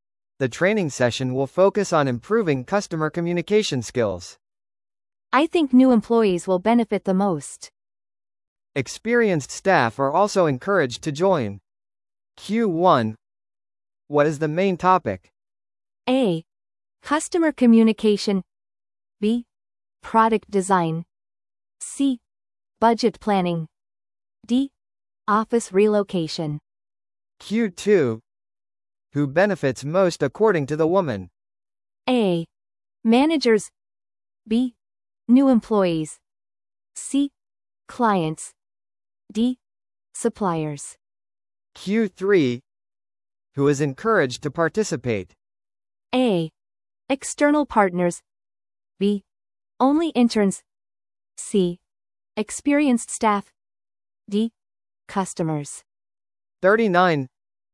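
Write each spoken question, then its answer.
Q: What is the main topic?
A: A: Customer communication.

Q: Who benefits most according to the woman?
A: B: New employees.

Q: Who is encouraged to participate?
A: C: Experienced staff.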